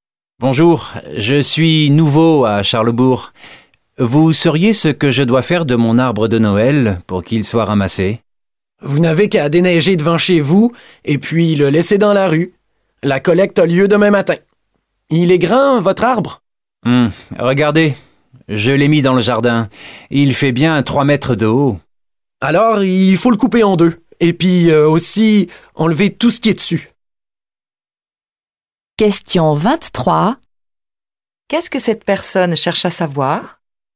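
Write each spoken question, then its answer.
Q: Qu'est-ce que cette personne cherche à savoir?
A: Ce qu'il doit faire de son arbre de Noël pour qu'il soit ramassé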